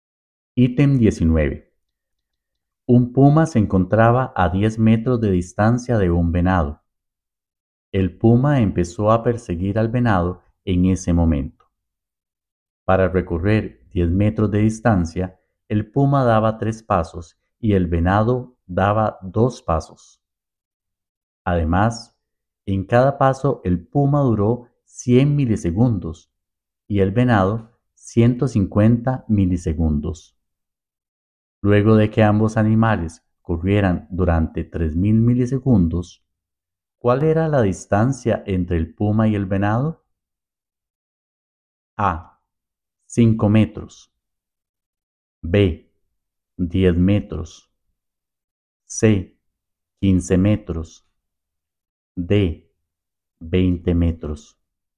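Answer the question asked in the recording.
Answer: B: 10 metros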